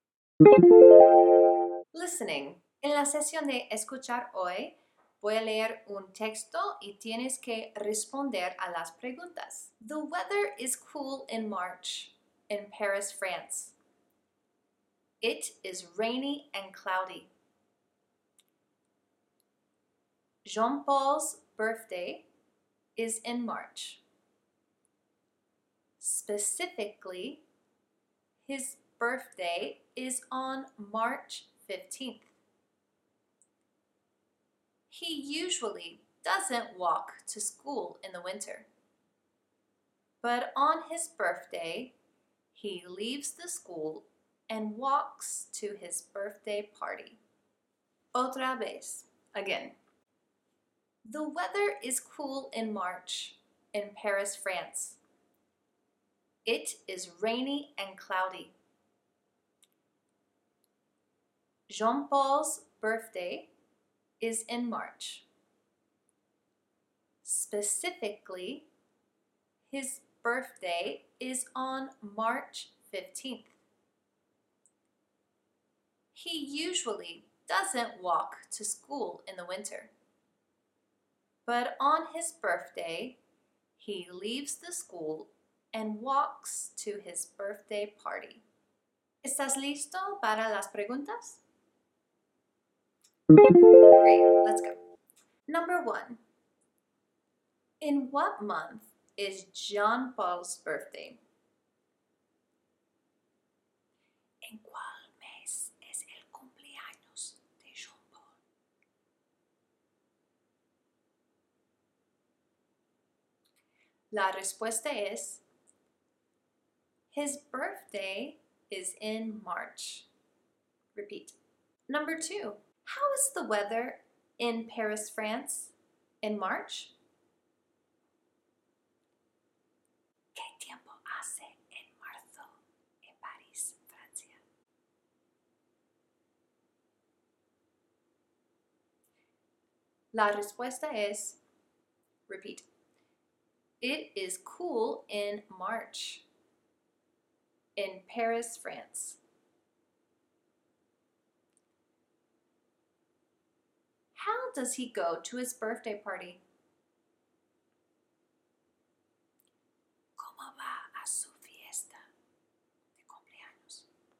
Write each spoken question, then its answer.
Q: In what month is Jean Paul's birthday?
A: His birthday is in March.

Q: How is the weather in Paris, France in March?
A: it is cool in March in Paris, France.

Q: does he go to his birthday party?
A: he walks to his birthday party.